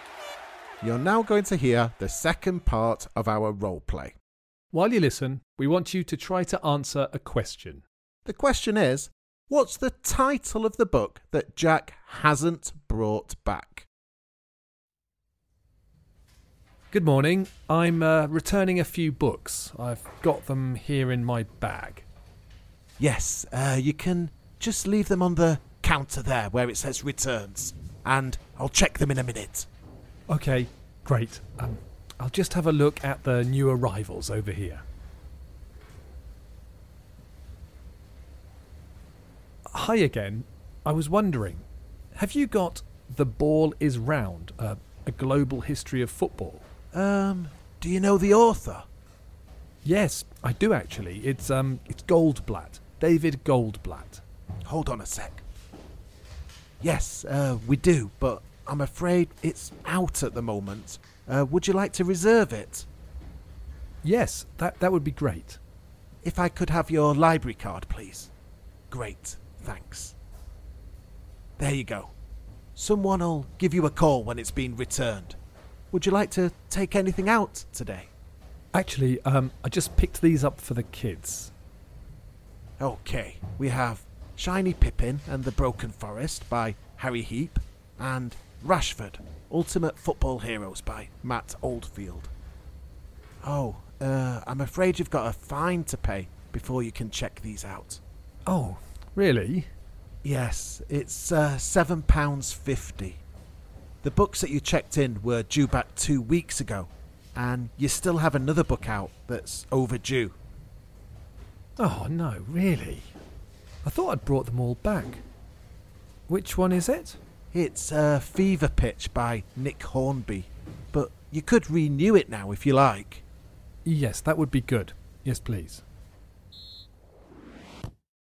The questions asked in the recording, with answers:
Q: what's the title of the book that Jack hasn't brought back?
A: The answer was Fever Pitch